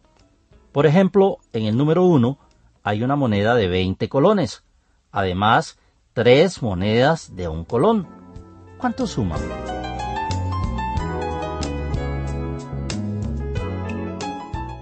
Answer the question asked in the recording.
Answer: Si contestó 23 colones, está en lo correcto.